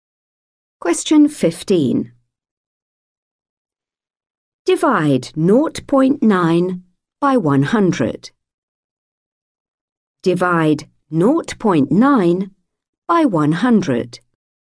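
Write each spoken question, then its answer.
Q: Divide 0.9 by 100.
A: 0.009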